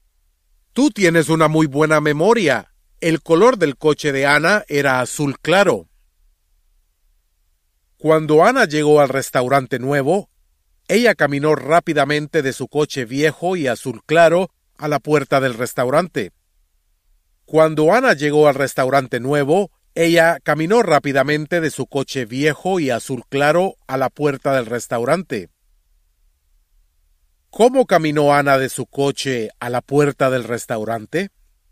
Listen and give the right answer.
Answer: Rápidamente.